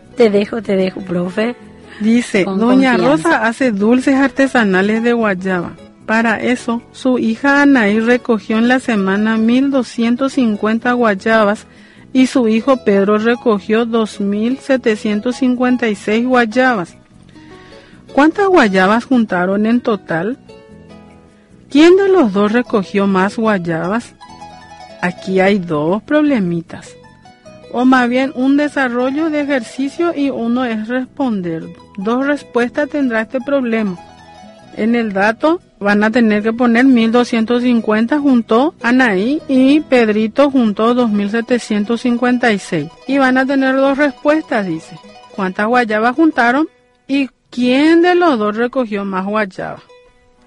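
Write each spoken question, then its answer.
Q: ¿Cuántas guayabas juntaron en total?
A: 4.006 guayabas

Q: ¿Quién de los dos recogió más guayabas?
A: Pedro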